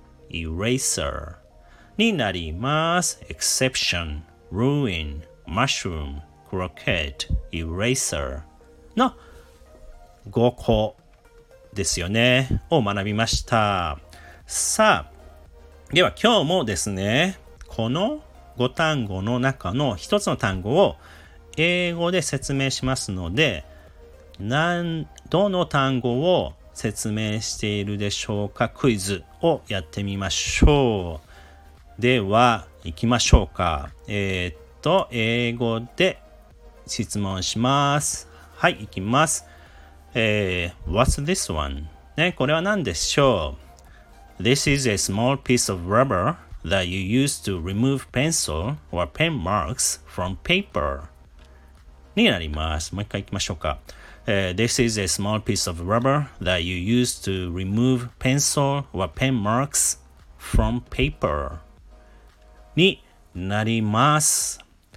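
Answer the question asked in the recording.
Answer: eraser(消しゴム)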